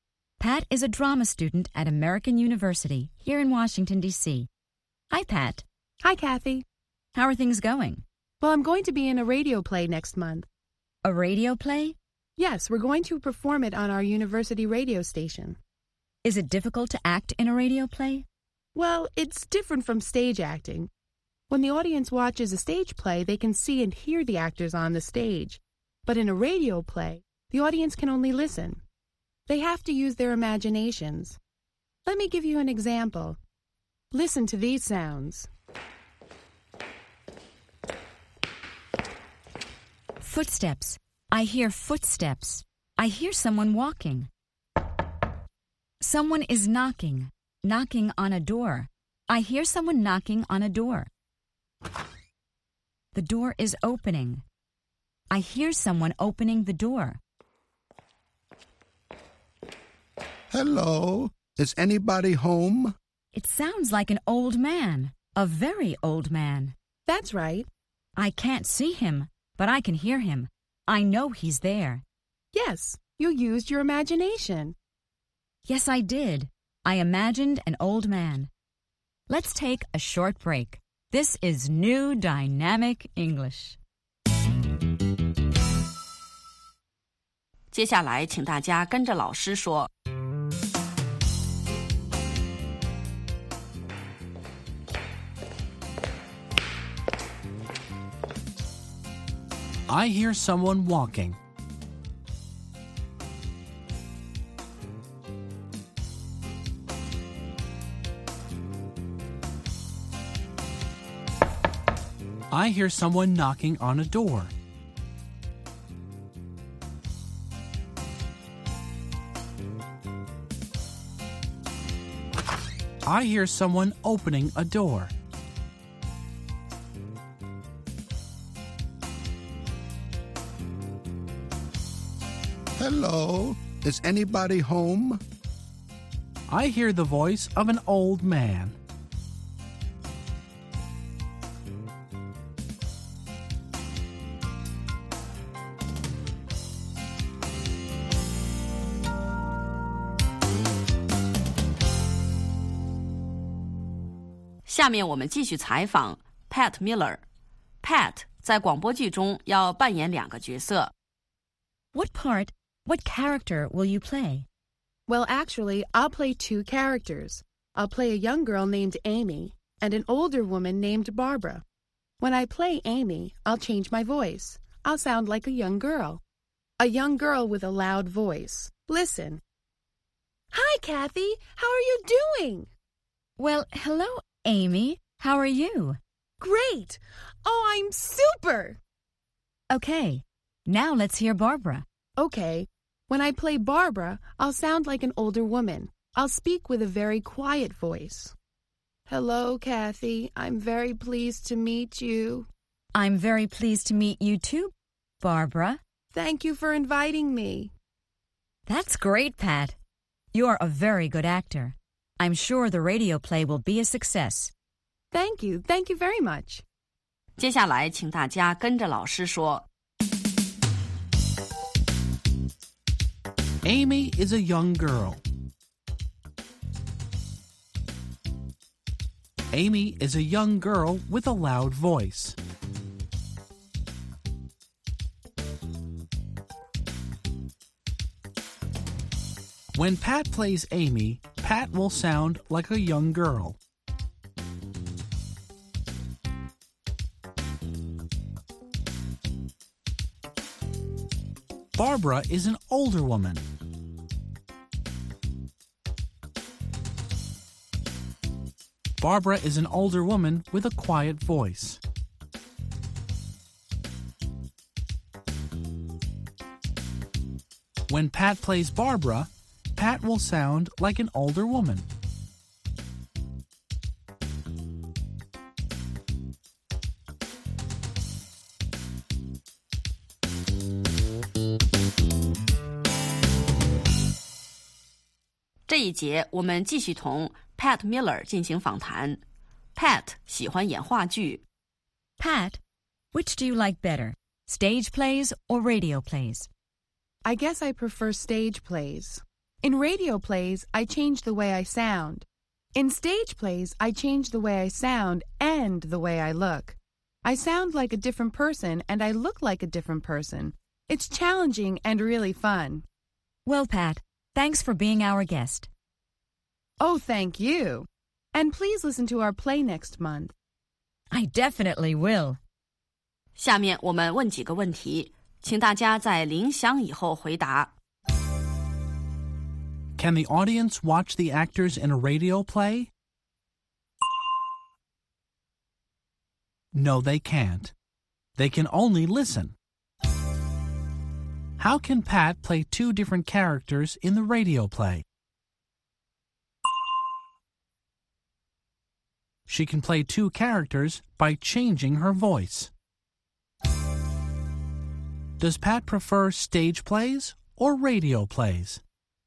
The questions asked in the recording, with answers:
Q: Can the audience watch the actors in a radio play?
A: No, they can't. They can only listen.

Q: Does Pat prefer stage plays or radio plays?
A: She prefers stage plays.